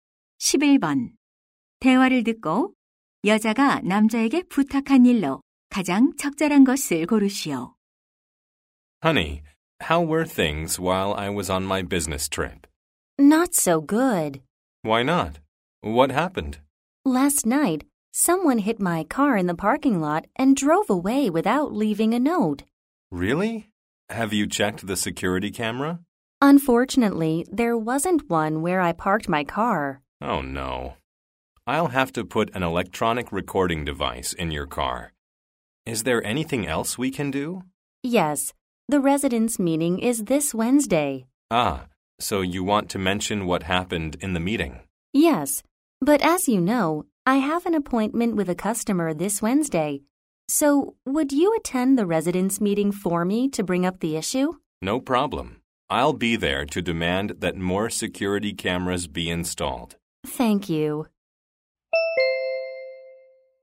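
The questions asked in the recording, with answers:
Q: 대화를 듣고 여자가 남자에게 부탁한 일로 가장 적절한 것을 고르시오.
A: 자신 대신 주민 회의에 참석하기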